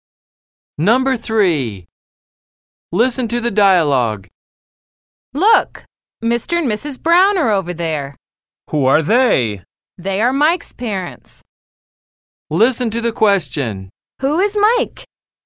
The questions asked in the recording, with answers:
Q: Who is Mike?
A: He's the Brown's son.